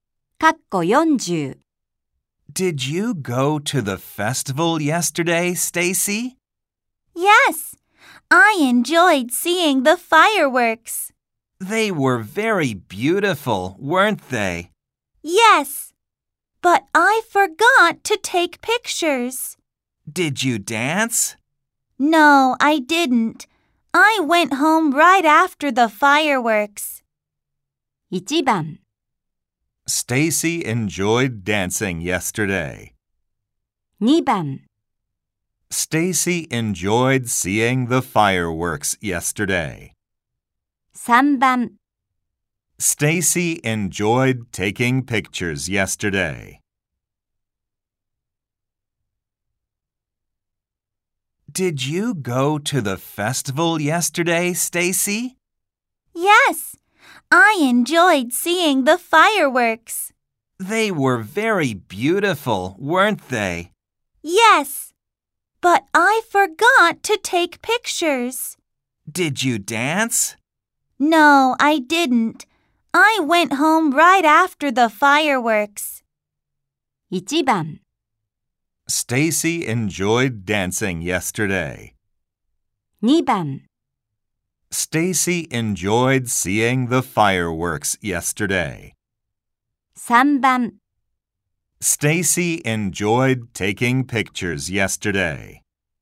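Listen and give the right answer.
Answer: 2: Stacy enjoyed seeing the fireworks yesterday.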